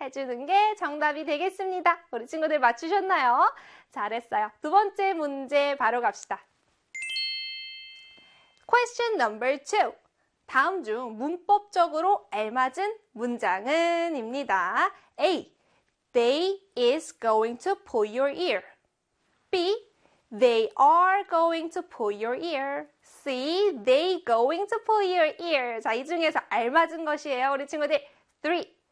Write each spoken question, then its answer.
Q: 다음 중 문법적으로 알맞은 문장은 입니다.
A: 그렇죠. B에 they are going to pull your ear.